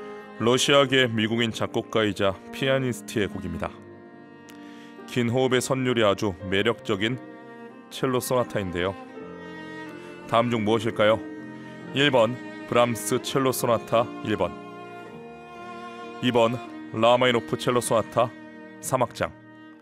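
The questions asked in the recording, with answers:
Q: 다음 중 무엇일까요?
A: 2번: 라마이노프 첼로 소나타 3악장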